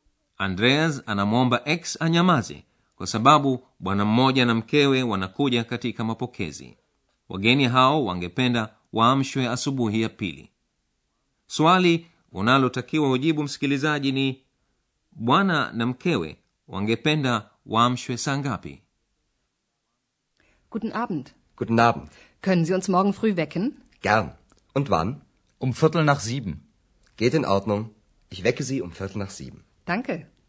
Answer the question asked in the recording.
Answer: anasema wangelipenda waamshwe saa moja na robo.